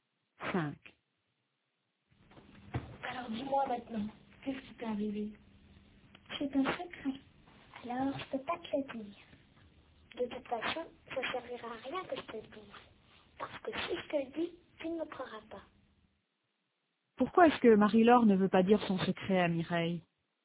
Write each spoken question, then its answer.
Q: Pourquoi est-ce que Marie-Laure ne veut pas dire son secret à Mireille?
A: Parce qu'elle pense que Mireille ne la croira pas.